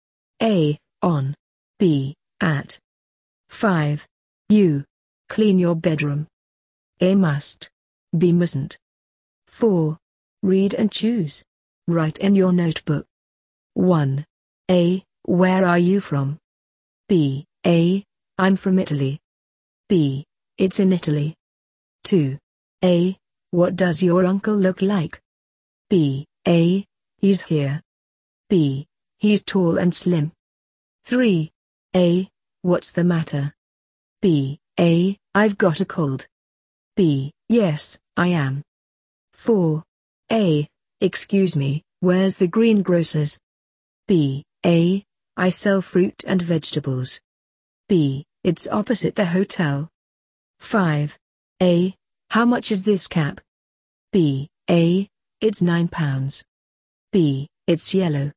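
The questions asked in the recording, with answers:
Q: Where are you from?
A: A: I'm from Italy.

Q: What does your uncle look like?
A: B: He's tall and slim.

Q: What's the matter?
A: A: I've got a cold.

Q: Excuse me, where's the greengrocer's?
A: B: It's opposite the hotel.

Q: How much is this cap?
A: A: It's £9.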